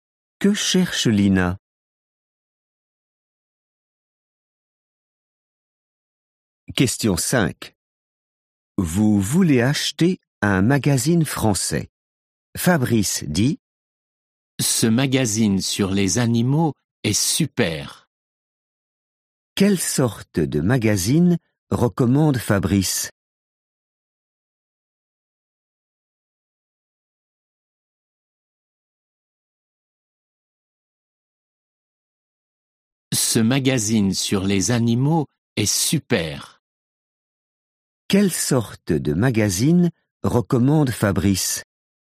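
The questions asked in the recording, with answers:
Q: Quelle sorte de magazine recommande Fabrice?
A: un magazine sur les animaux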